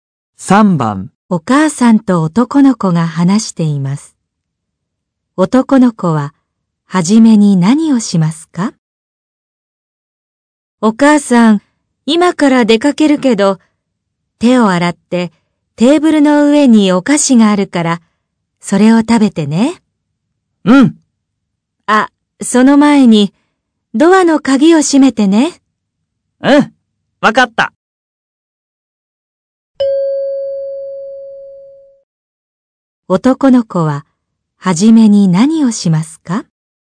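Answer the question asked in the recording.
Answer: ドアの鍵を閉める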